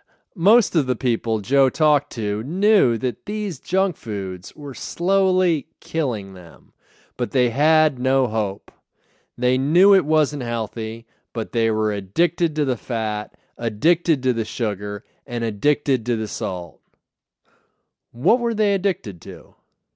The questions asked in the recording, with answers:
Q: What were they addicted to?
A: They were addicted to fat, sugar, and salt.